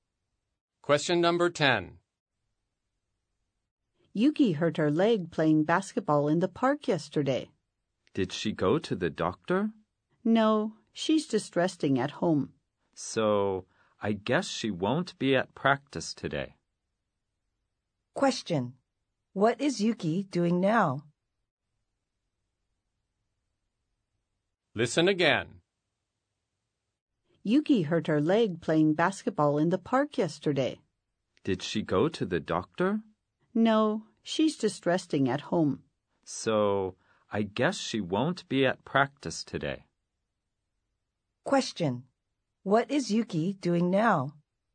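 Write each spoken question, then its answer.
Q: What is Yuki doing now?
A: Resting at home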